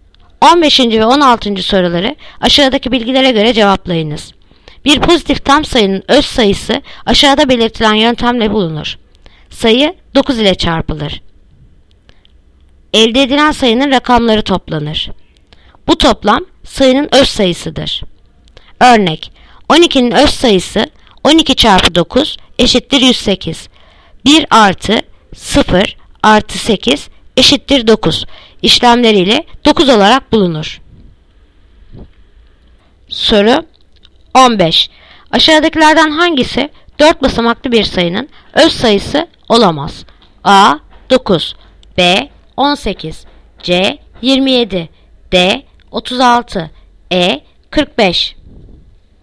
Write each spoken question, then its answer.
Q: Aşağıdakilerden hangisi 4 basamaklı bir sayının öz sayısı olamaz?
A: Yanıt Edirne 45.